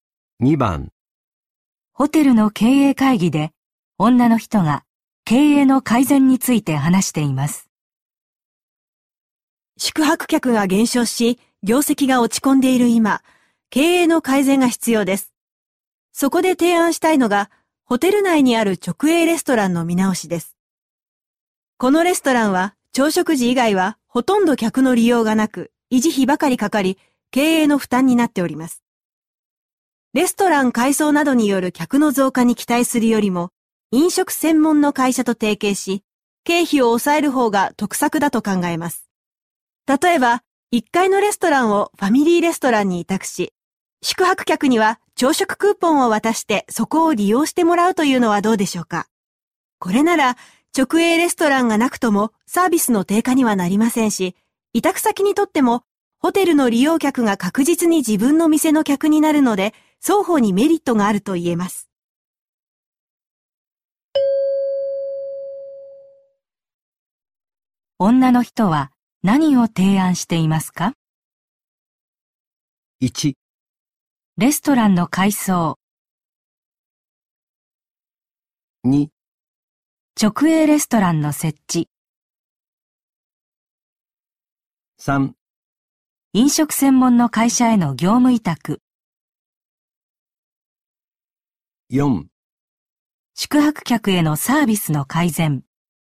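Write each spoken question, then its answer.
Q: 女の人は何を提案していますか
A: 3: 飲食専門の会社への業務委託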